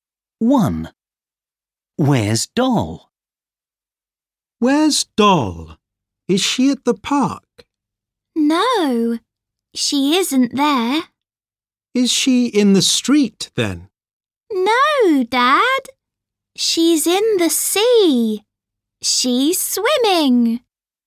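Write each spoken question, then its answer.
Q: Where's Doll?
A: In the sea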